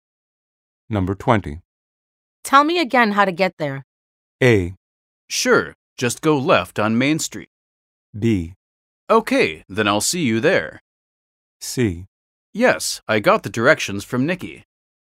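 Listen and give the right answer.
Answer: A: Sure, just go left on Main Street.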